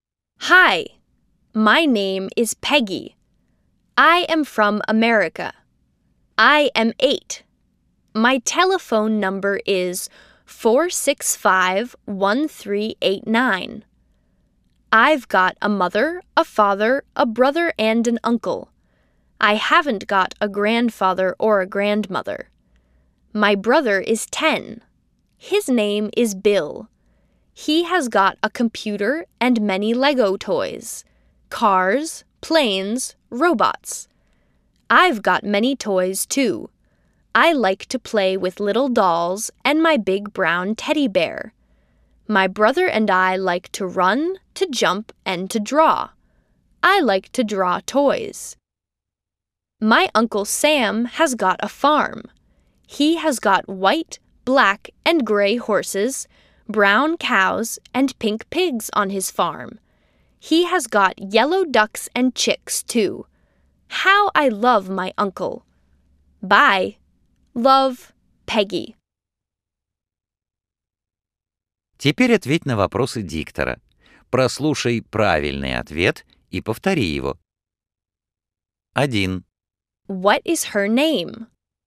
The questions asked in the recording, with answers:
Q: What is her name?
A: Her name is Peggy.